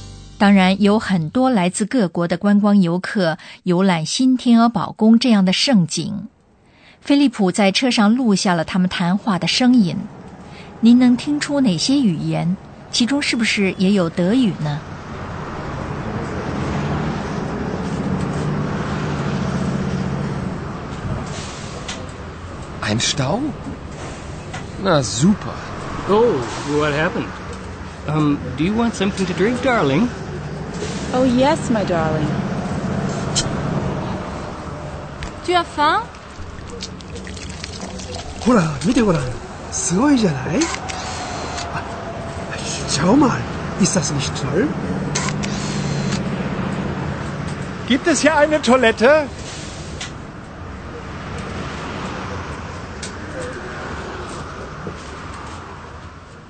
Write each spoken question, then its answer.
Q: 您能听出哪些语言?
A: 您听出了英语和法语或者日语。